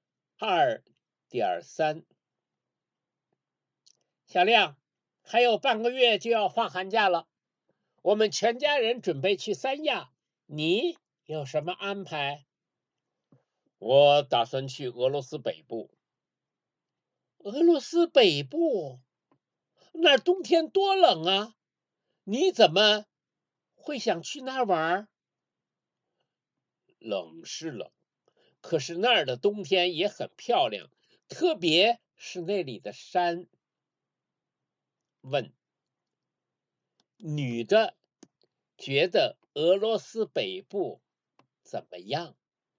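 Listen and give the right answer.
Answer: 冬天太冷了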